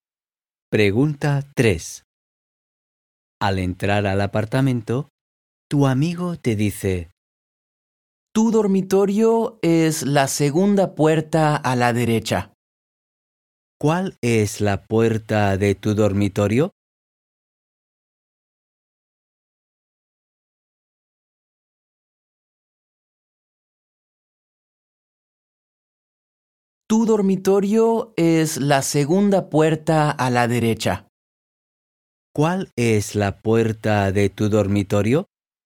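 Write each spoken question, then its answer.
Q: ¿Cuál es la puerta de tu dormitorio?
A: la segunda puerta a la derecha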